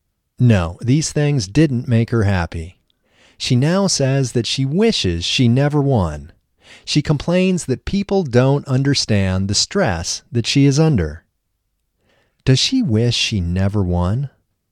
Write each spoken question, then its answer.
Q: Does she wish she never won?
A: Yes, she wishes she never won.